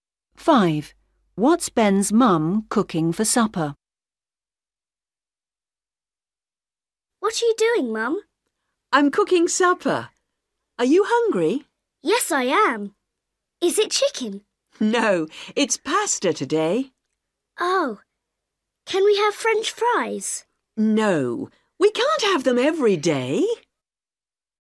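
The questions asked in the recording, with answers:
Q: What's Ben's mum cooking for supper?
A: Pasta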